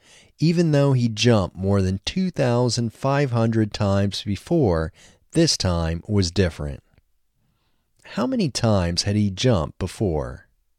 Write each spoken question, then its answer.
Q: How many times had he jumped before?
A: He had jumped more than 2,500 times before.